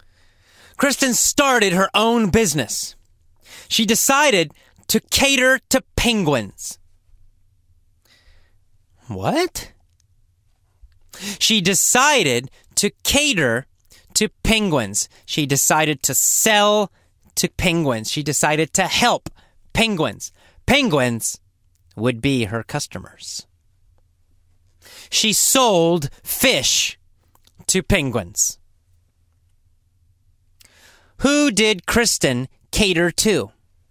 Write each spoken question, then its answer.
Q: Who did Kristen cater to?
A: She catered to penguins.